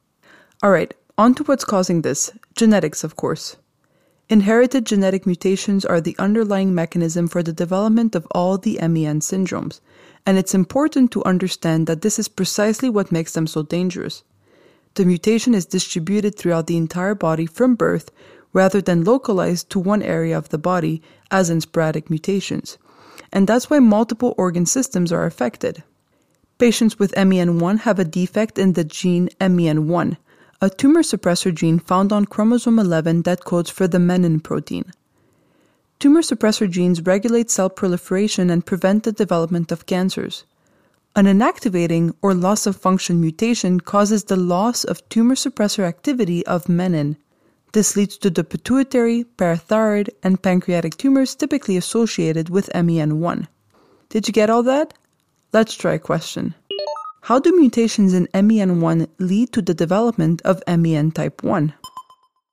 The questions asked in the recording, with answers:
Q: How do mutations in MEN1 lead to the development of MEN type 1?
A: In MEN1, a loss of function mutation in MEN1 inactivates its tumor suppressing ability, allowing the development of cancer.